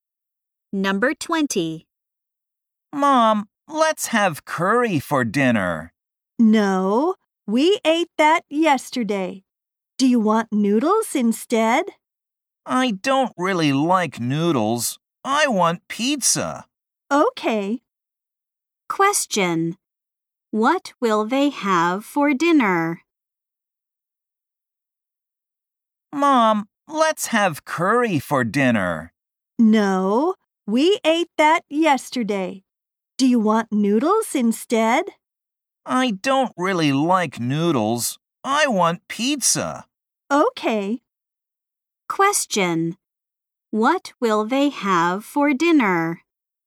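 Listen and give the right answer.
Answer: Pizza.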